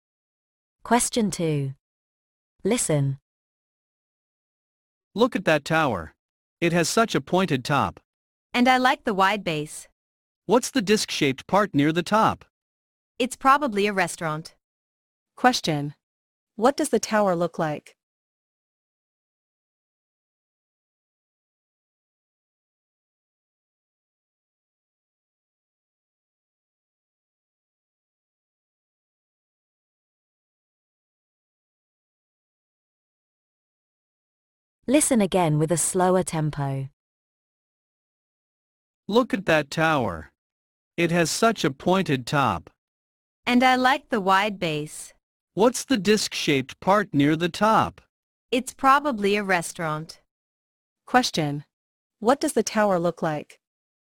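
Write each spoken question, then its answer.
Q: What does the tower look like?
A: It has a pointed top, a wide base and a disc-shaped part near the top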